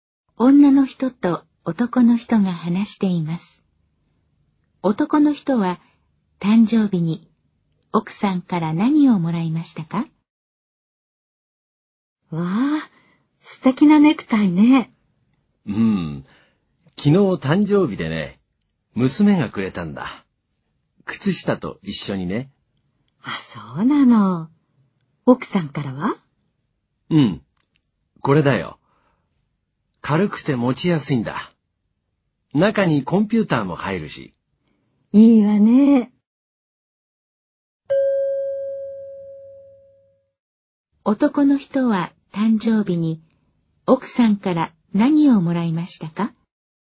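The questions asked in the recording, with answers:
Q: 男の人は誕生日に奥さんから何をもらいましたか?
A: かばん(コンピューターも入る軽いかばん)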